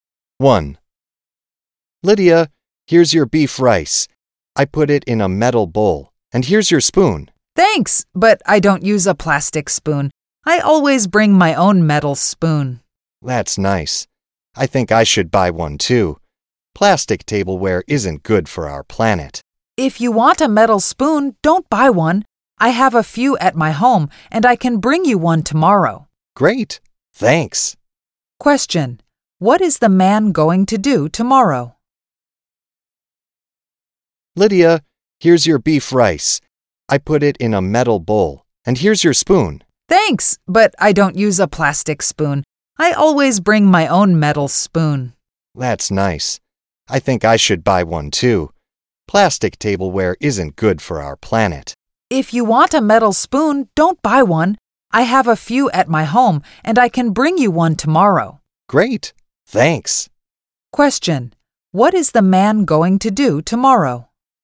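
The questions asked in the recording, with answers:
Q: What is the man going to do tomorrow?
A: Bring Lydia a metal spoon from his home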